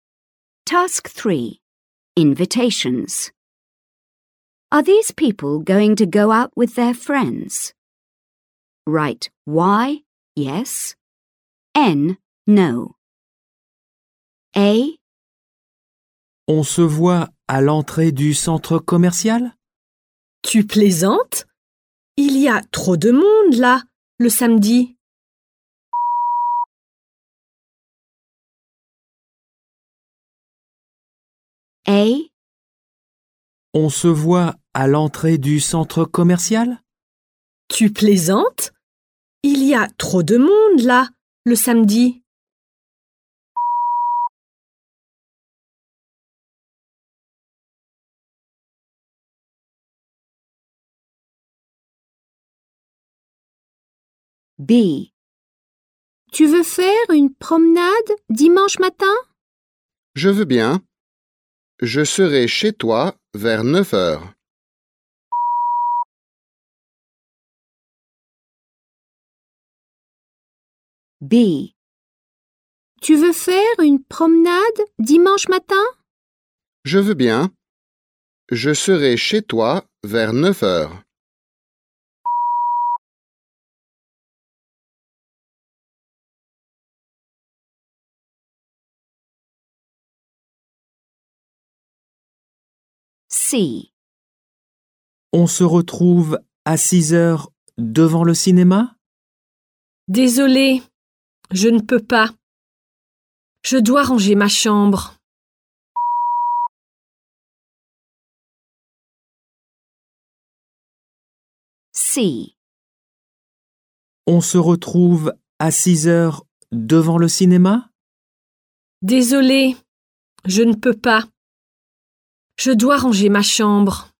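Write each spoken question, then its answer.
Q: Are these people going to go out with their friends?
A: N (no)

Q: Are these people going to go out with their friends?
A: Y (yes)

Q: Are these people going to go out with their friends?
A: N (no)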